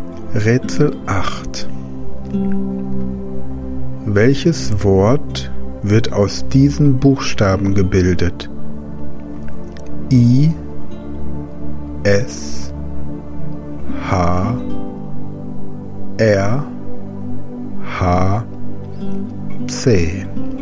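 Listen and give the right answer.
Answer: Hirsch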